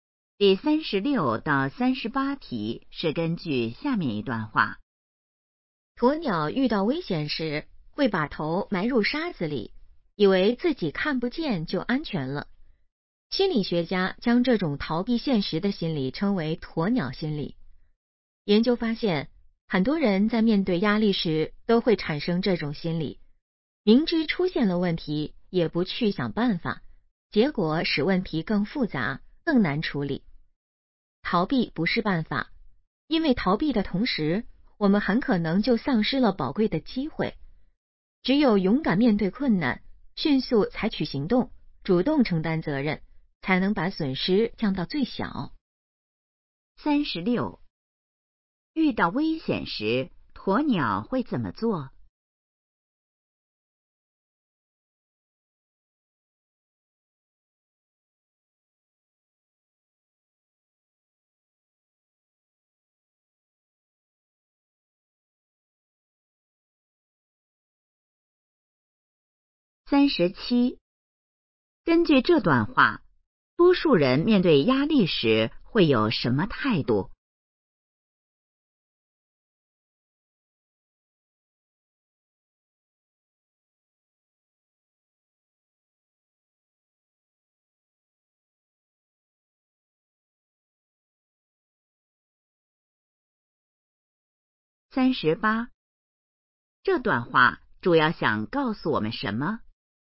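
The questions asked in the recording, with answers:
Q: 遇到危险时,鸵鸟会怎么做?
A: 把头埋入沙子里

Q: 根据这段话,多数人面对压力时会有什么态度?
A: 逃避

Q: 这段话主要想告诉我们什么?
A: 要勇敢面对困难,不要逃避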